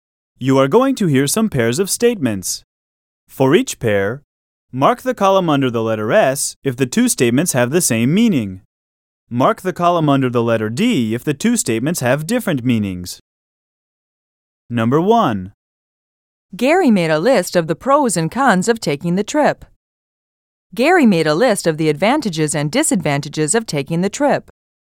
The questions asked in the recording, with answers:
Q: For each pair, mark the column under the letter S if the two statements have the same meaning.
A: Same is the correct answer.